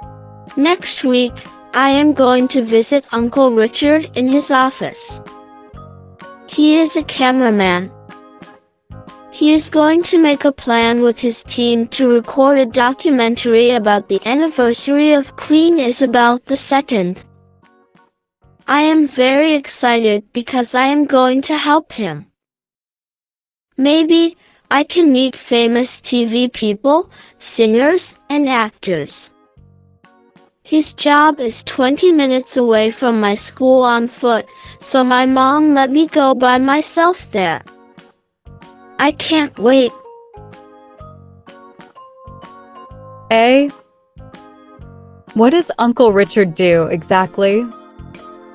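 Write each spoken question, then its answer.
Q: What does Uncle Richard do exactly?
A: He is a cameraman.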